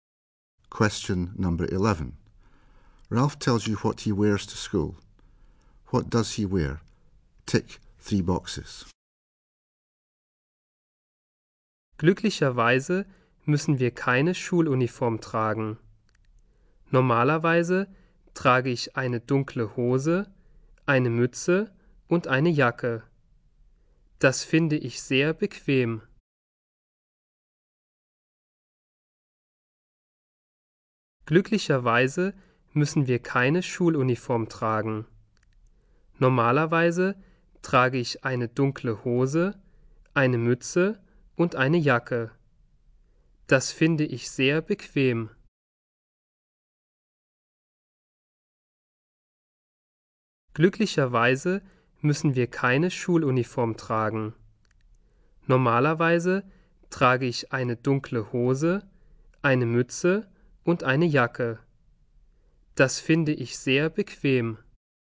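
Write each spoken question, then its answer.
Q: What does he wear?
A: Dark trousers, a cap and a jacket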